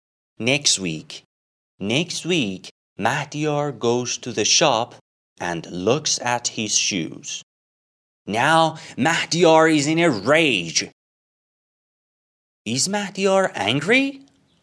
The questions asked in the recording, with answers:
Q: Is Mahdiyar angry?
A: Yes, Mahdiyar is in a rage.